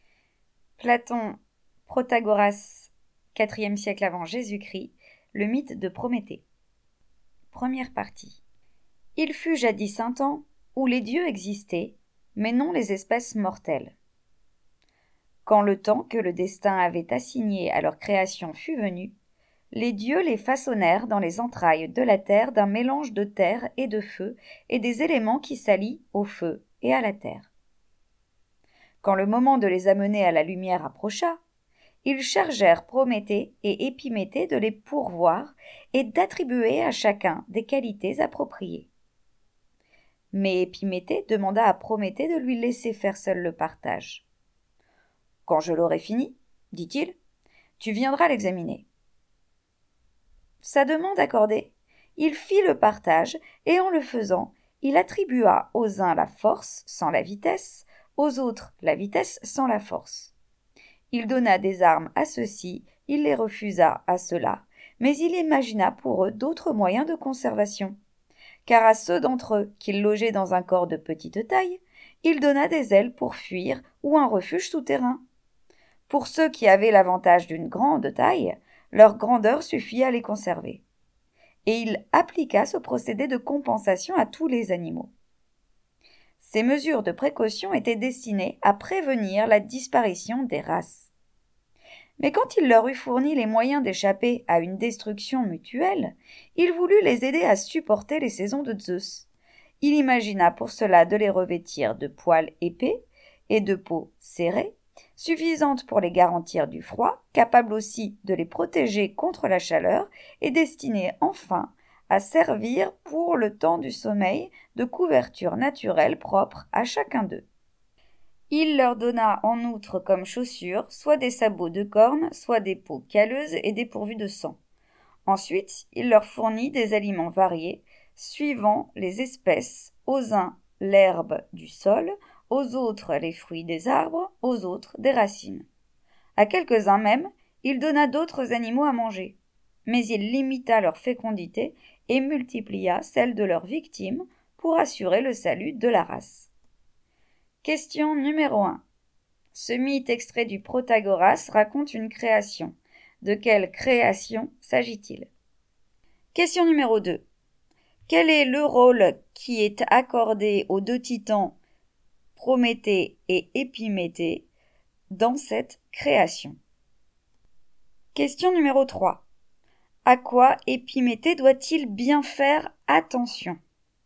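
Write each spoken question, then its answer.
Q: Ce mythe extrait du Protagoras raconte une création. De quelle création s'agit-il?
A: La création des espèces mortelles (les animaux)

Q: Quel est le rôle qui est accordé aux deux titans Prométhée et Épiméthée dans cette création?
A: Pourvoir les espèces et attribuer à chacune des qualités appropriées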